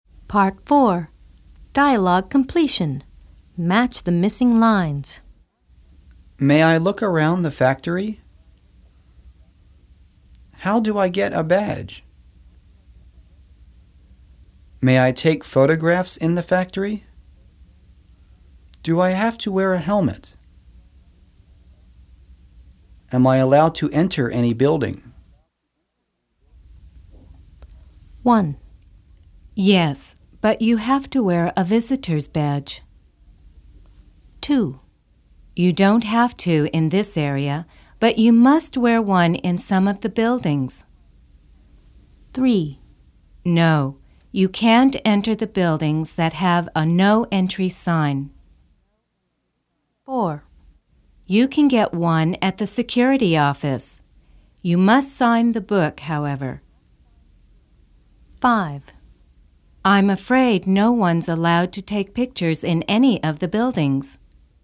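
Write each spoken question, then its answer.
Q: Yes, but you have to wear a visitor's badge.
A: May I look around the factory?

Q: You don't have to in this area, but you must wear one in some of the buildings.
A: Do I have to wear a helmet?

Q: No, you can't enter the buildings that have a no entry sign.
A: Am I allowed to enter any building?

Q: You can get one at the security office.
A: How do I get a badge?

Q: I'm afraid no one's allowed to take pictures in any of the buildings.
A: May I take photographs in the factory?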